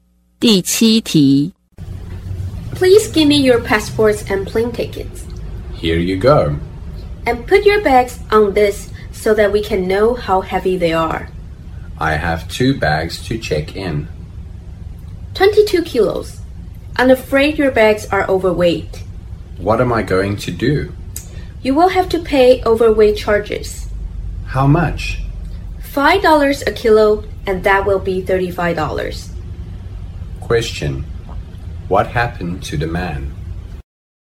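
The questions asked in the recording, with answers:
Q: What happened to the man?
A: His bags were overweight, so he had to pay $35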